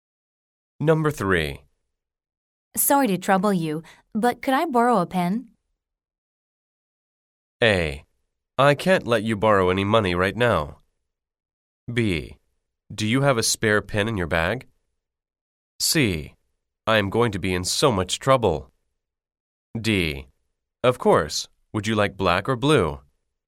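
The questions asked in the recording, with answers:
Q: Sorry to trouble you, but could I borrow a pen?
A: D: Of course. Would you like black or blue?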